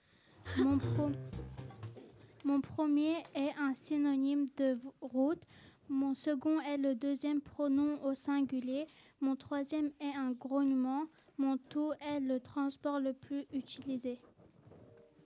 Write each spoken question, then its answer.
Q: Mon tout est le transport le plus utilisé.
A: Il s'agissait de la voiture.